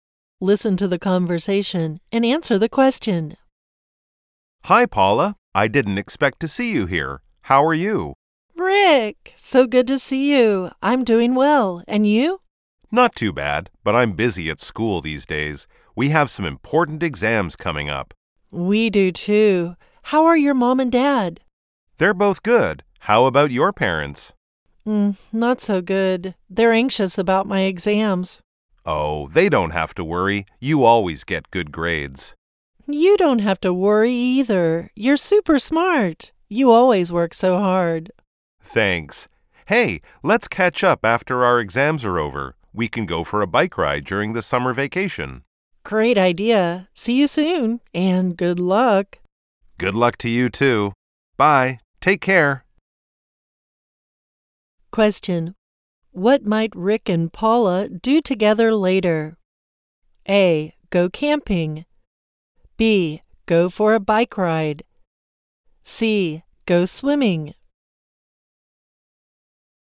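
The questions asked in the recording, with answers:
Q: What might Rick and Paula do together later?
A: B: Go for a bike ride.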